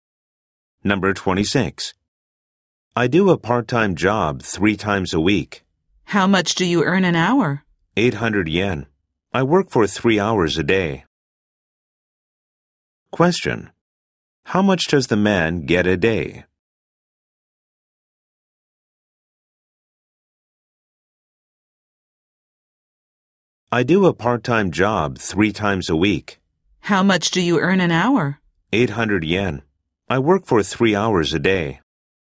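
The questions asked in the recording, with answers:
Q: How much does the man get a day?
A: 2,400 yen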